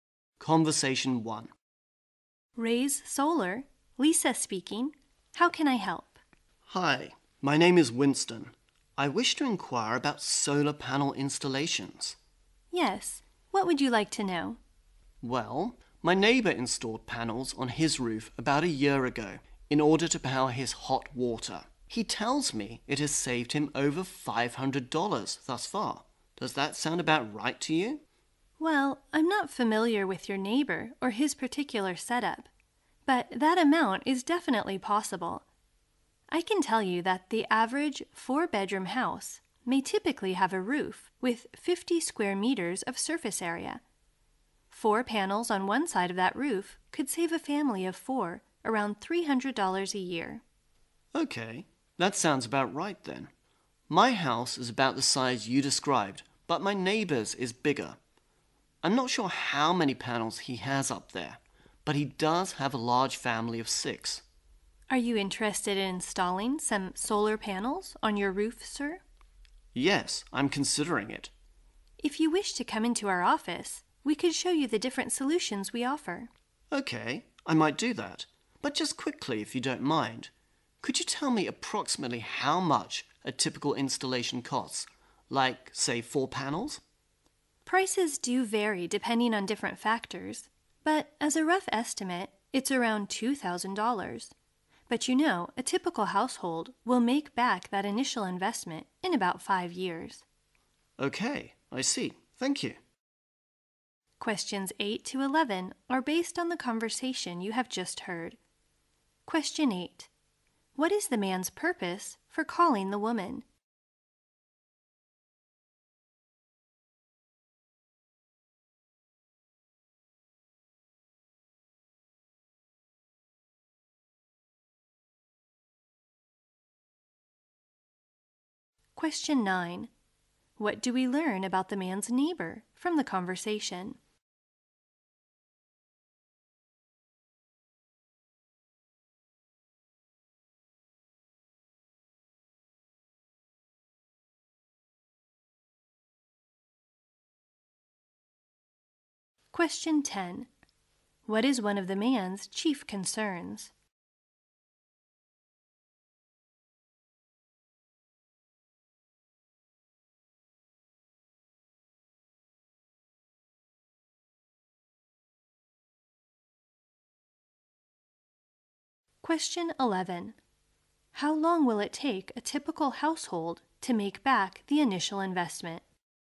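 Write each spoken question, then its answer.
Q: What is the man's purpose for calling the woman?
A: To ask about solar panel installation

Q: What is one of the man's chief concerns?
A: The cost of installation

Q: How long will it take a typical household to make back the initial investment?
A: About 5 years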